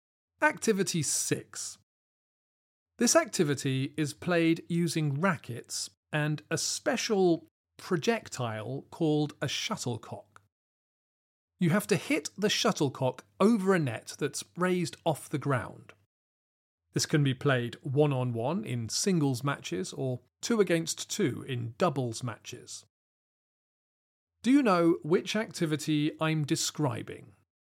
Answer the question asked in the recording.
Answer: The answer is badminton.